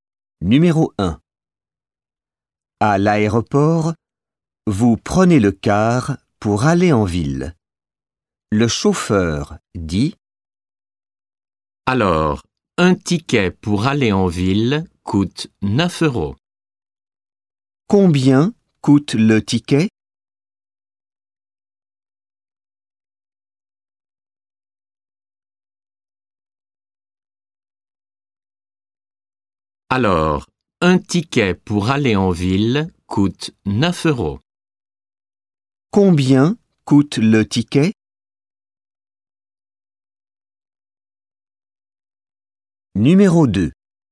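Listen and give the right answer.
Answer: 9 euros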